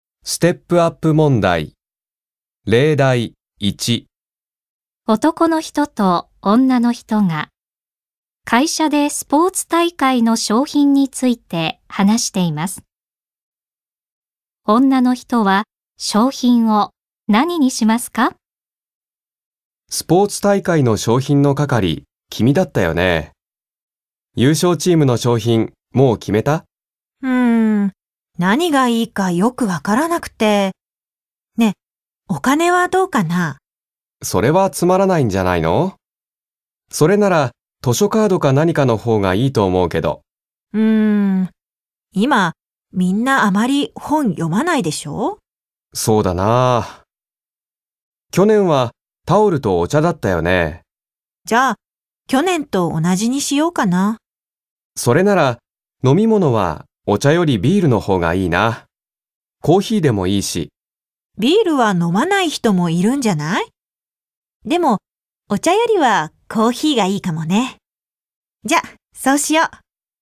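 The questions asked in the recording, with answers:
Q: 女の人は商品を何にしますか?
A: タオルとコーヒー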